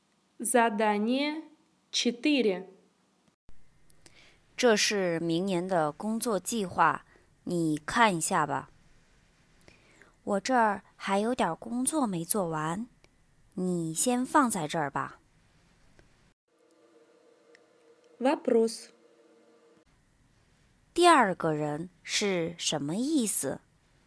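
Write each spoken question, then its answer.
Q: 第二个人是什么意思?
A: 他现在没空看,先放着,等忙完了再看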